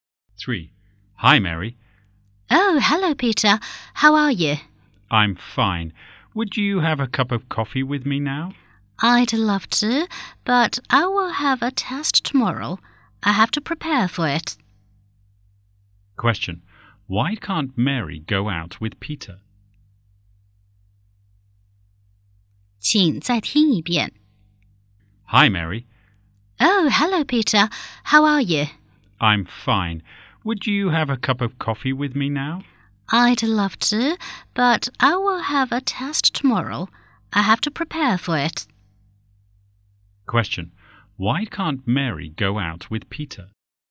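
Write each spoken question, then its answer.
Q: Question. Why can't Mary go out with Peter?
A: She has to prepare for a test tomorrow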